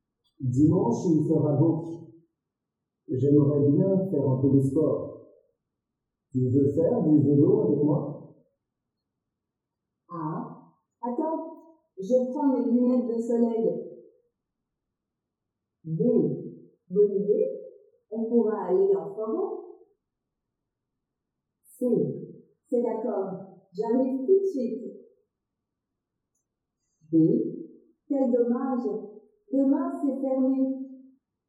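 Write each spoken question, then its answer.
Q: Tu veux faire du vélo avec moi?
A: B: Bon, bonne idée, on pourra aller en forêt.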